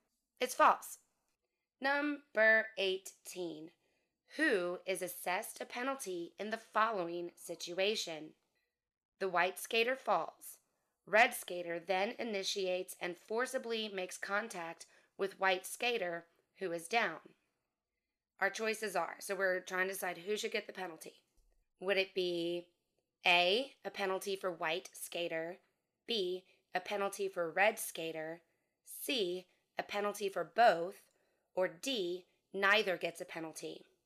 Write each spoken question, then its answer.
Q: Who is assessed a penalty in the following situation?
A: The answer is B, a penalty for red skater.